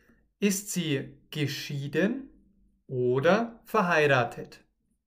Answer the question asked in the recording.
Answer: Geschieden. Sie ist oder sie lebt geschieden.